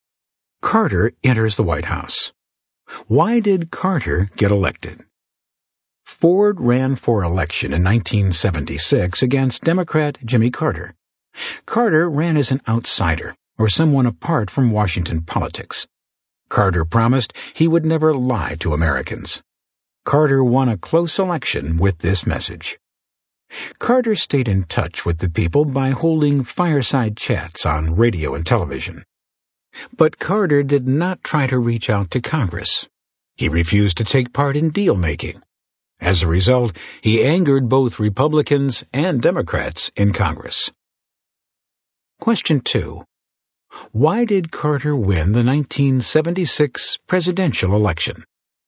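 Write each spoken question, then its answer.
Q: Why did Carter win the 1976 presidential election?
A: He ran as an outsider and promised never to lie to Americans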